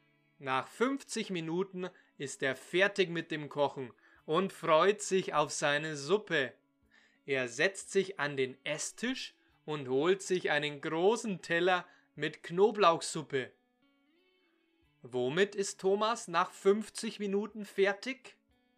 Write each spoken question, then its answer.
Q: Womit ist Thomas nach 50 Minuten fertig?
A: mit dem Kochen.